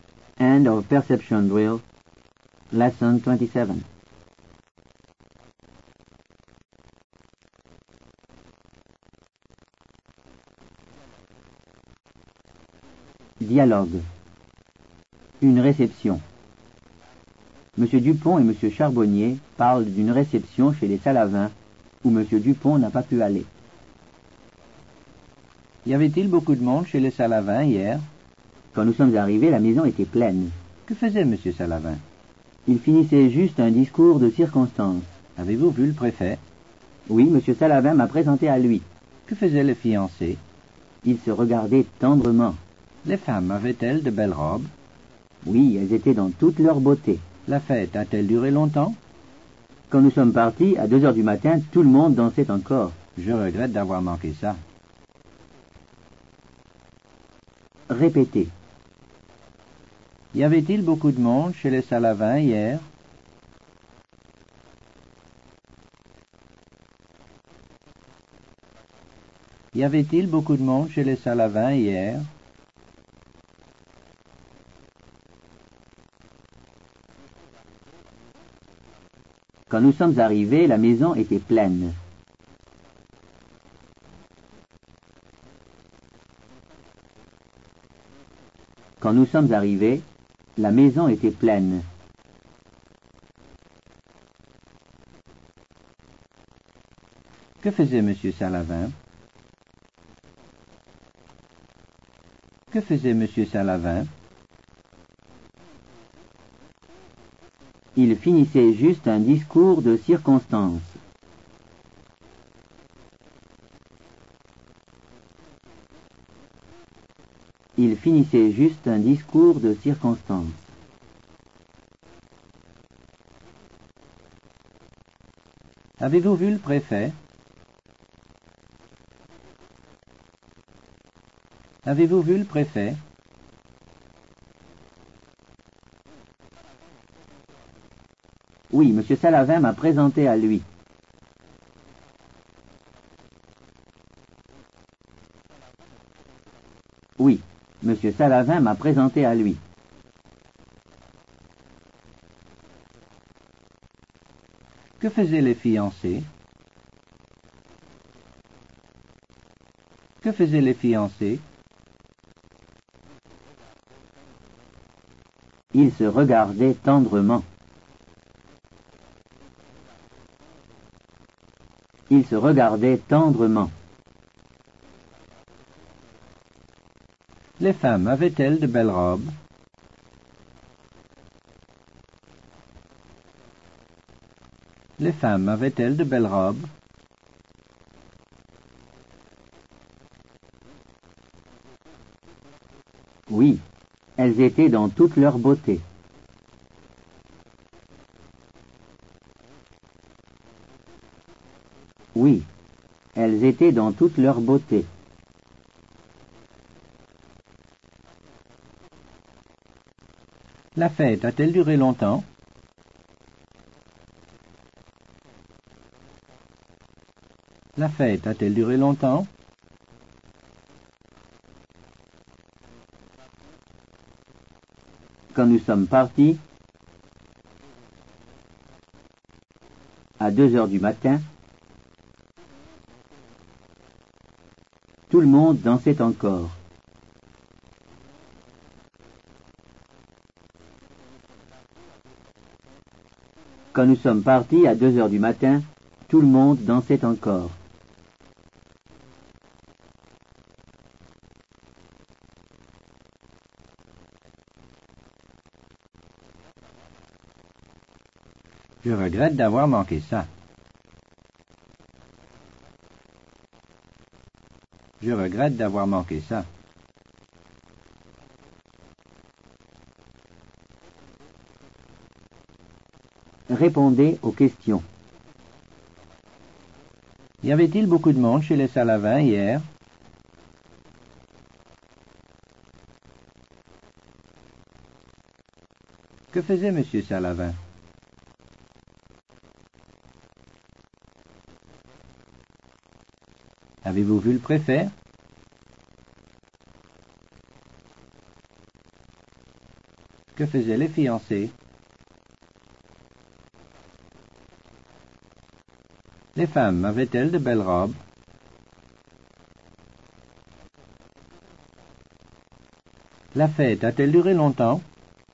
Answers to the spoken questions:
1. Quand nous sommes arrivés, la maison était pleine.
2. Il finissait juste un discours de circonstance.
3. Oui, Monsieur Salavin m'a présenté à lui.
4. Ils se regardaient tendrement.
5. Oui, elles étaient dans toute leur beauté.
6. Quand nous sommes partis à 2 heures du matin, tout le monde dansait encore.